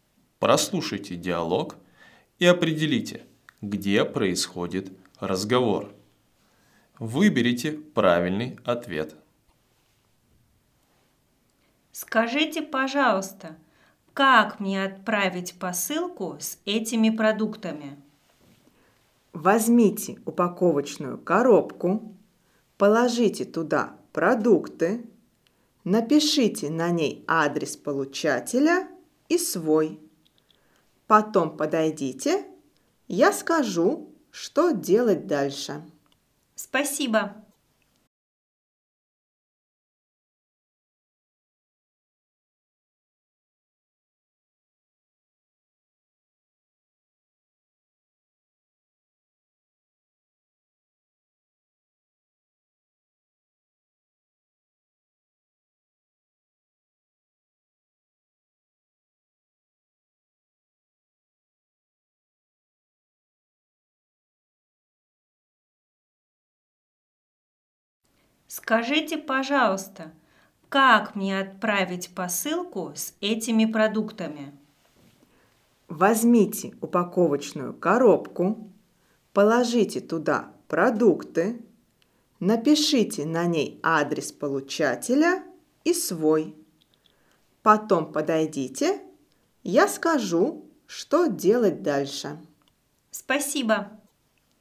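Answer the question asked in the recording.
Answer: На почте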